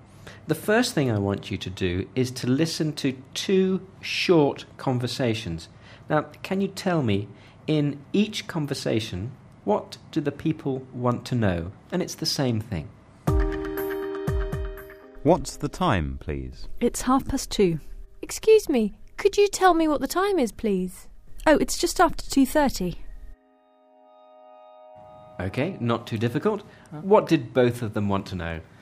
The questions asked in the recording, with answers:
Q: What did both of them want to know?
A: She wanted to know what time it is.